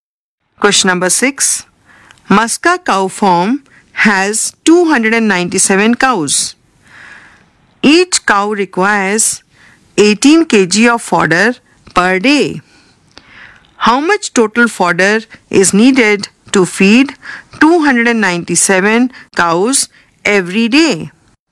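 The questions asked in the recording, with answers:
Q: How much total fodder is needed to feed 297 cows every day?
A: 5346 kg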